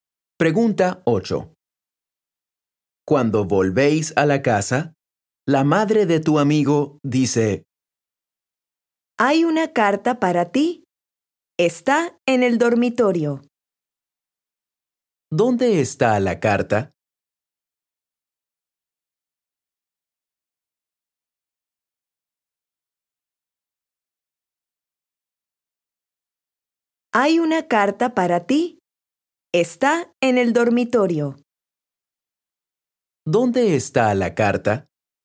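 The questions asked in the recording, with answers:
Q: ¿Dónde está la carta?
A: En el dormitorio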